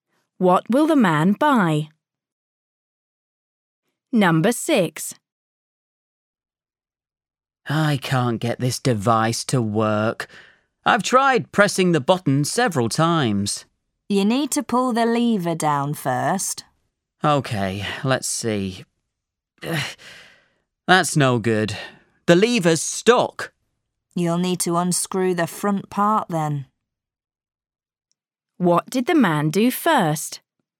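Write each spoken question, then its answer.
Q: What did the man do first?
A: pressed the button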